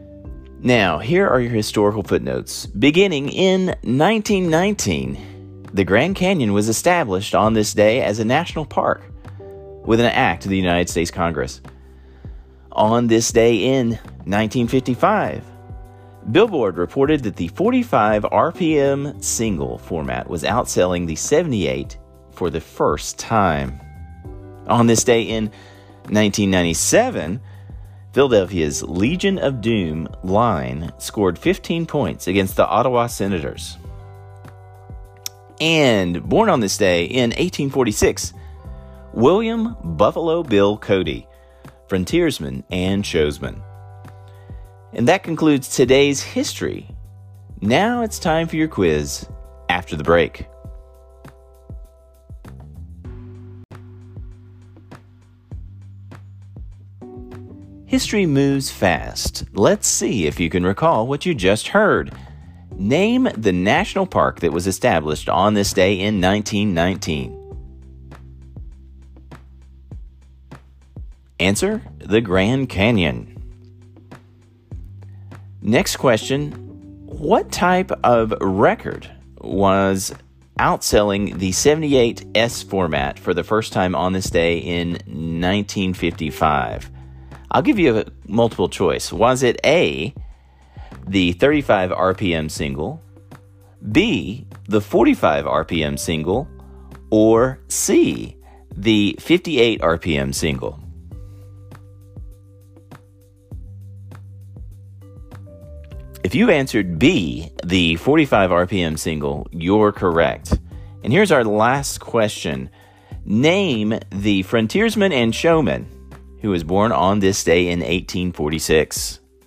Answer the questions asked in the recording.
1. the Grand Canyon.
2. If you answered B, the 45 RPM single, you're correct.
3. The answer to that question is William Buffalo Bill Cody.